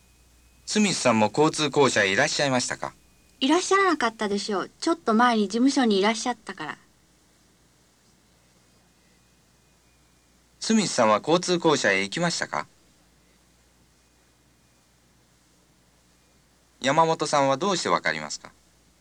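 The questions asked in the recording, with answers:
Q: スミスさんは交通公社へ行きましたか?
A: いいえ、行きませんでした

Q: 山本さんはどうしてわかりますか?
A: ちょっと前に事務所にいたから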